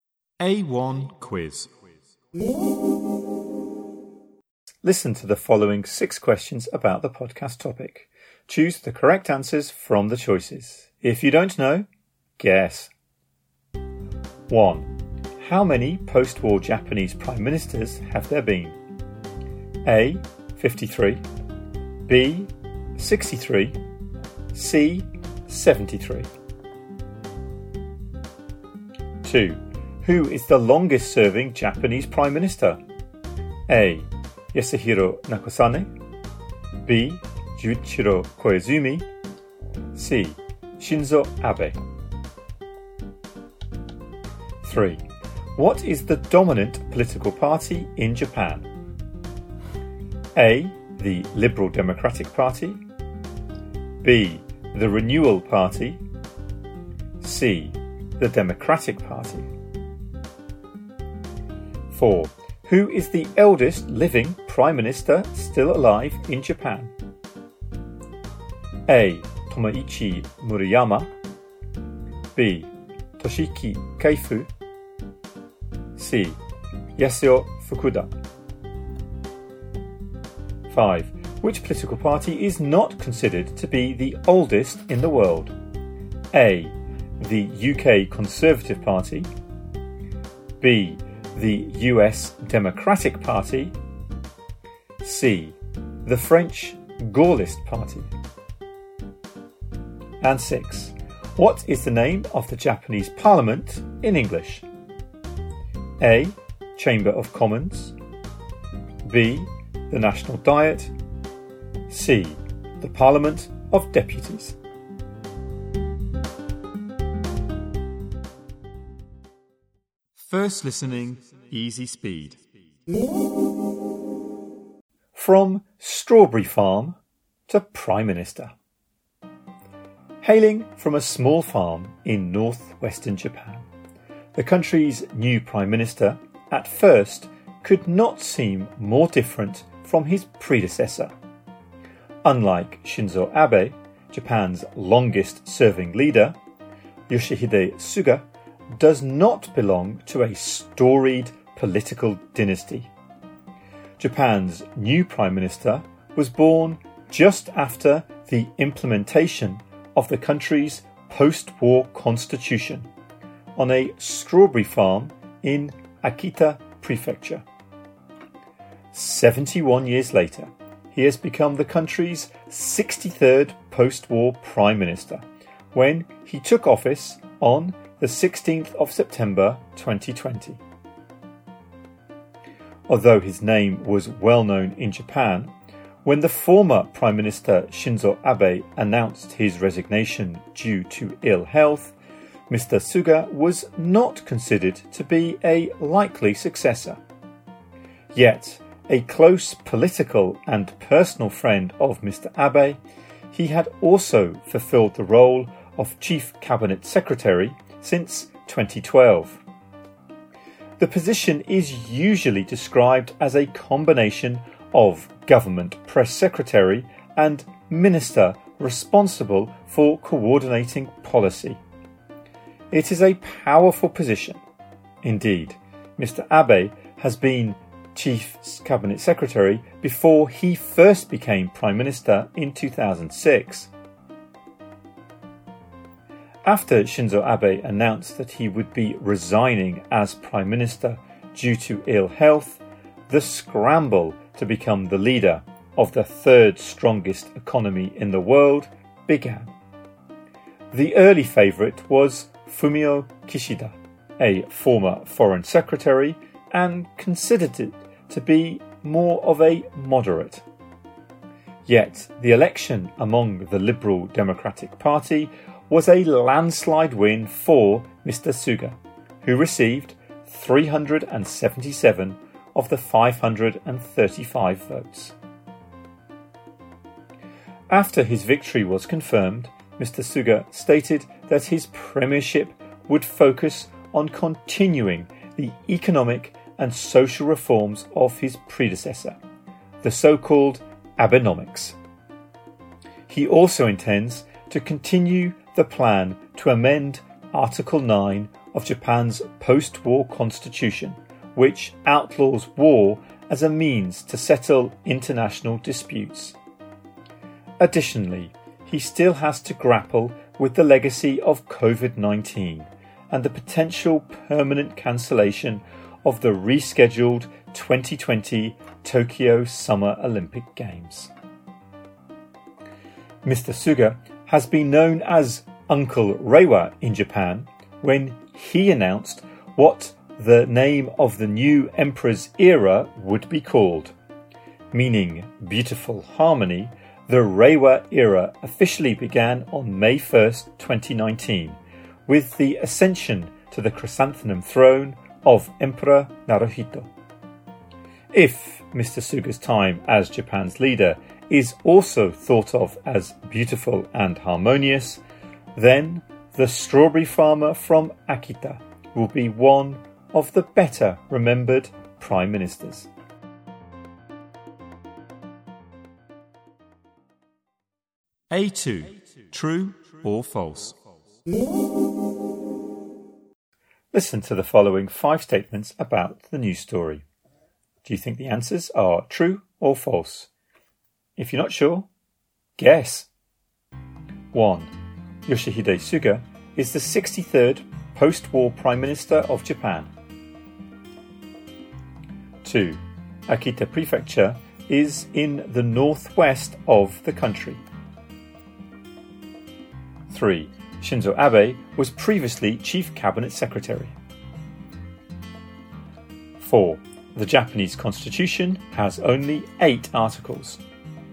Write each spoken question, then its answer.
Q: How many post-war Japanese prime ministers have there been?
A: 1B

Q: Who is the longest-serving Japanese Prime Minister?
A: 2C

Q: What is the dominant political party in Japan?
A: 3A

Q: Yoshihide Suga is the 63rd post-war Prime Minister of Japan.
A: 1 true

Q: Akita Prefecture is in the northwest of the country.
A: 2 true

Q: Shinzo Abe was previously Chief Cabinet Secretary.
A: 3 true

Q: The Japanese Constitution has only 8 articles.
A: 4 false